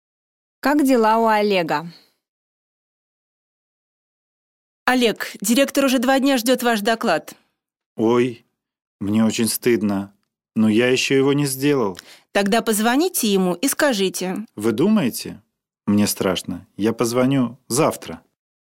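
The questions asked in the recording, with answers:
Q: Как дела у Олега?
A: Плохо: ему стыдно и страшно, он не сделал доклад.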